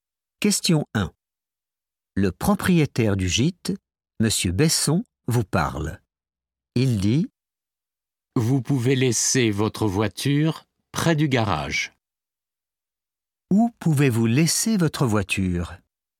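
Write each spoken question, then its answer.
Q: Où pouvez-vous laisser votre voiture?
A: près du garage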